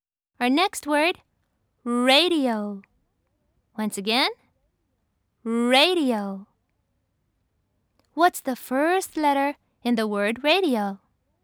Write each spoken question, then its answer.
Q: What's the first letter in the word radio?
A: Yes, it's R.